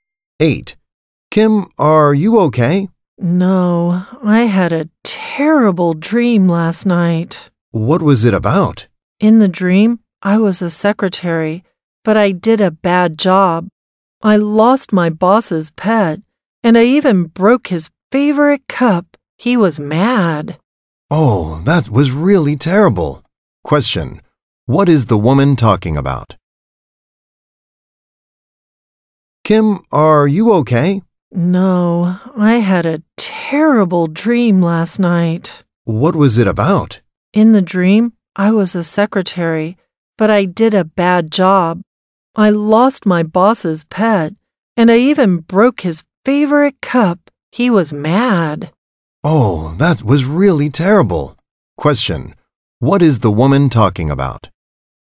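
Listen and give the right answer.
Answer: Her terrible dream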